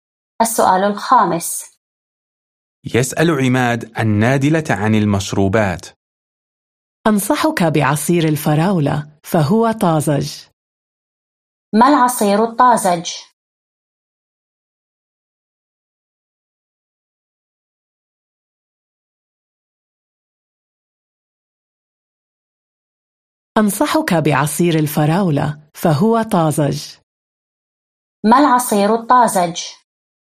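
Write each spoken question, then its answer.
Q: ما العصير الطازج؟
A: عصير الفراولة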